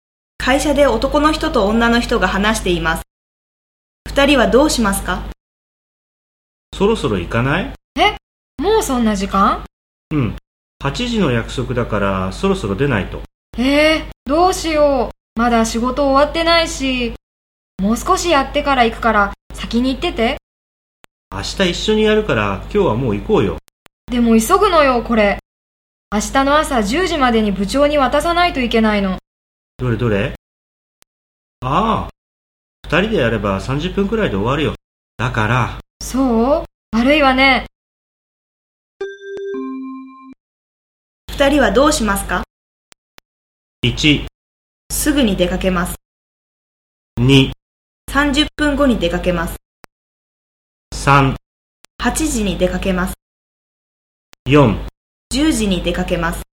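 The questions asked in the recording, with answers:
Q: 二人はどうしますか?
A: 2: 30分後に出かけます。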